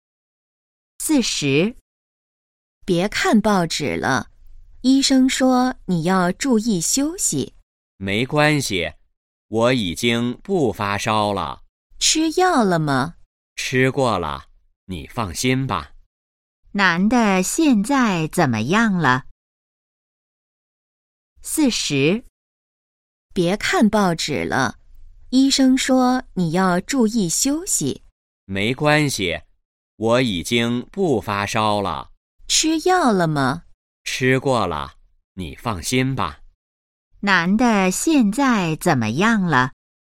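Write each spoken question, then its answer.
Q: 男的现在怎么样了?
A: 不发烧了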